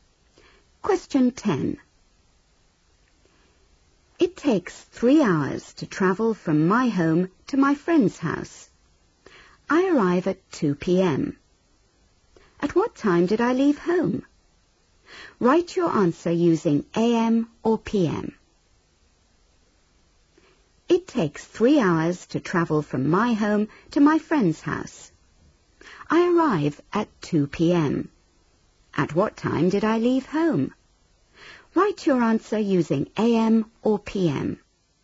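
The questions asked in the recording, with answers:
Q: At what time did I leave home?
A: 11 a.m.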